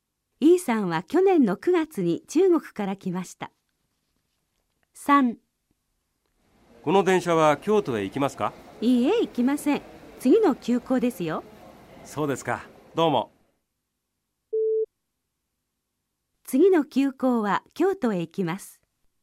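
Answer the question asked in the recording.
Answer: 正しい(○)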